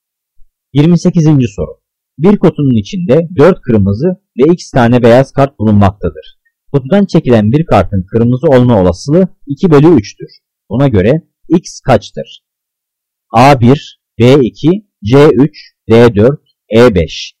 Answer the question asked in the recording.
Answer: Cevap B2.